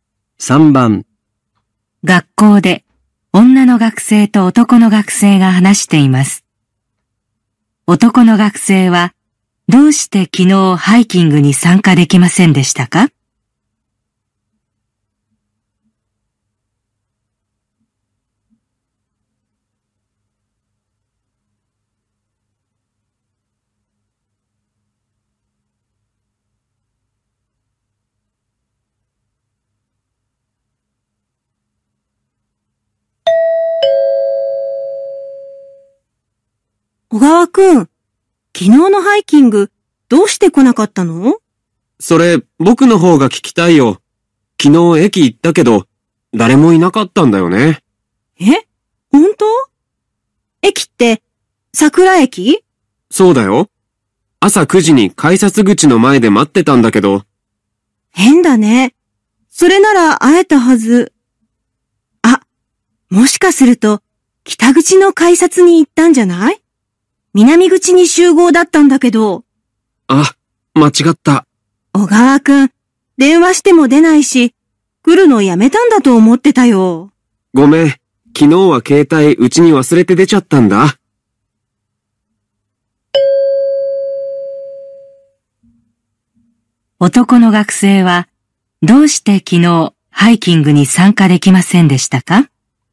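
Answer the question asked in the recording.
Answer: 集合場所の改札を間違えたから(南口ではなく北口に行った)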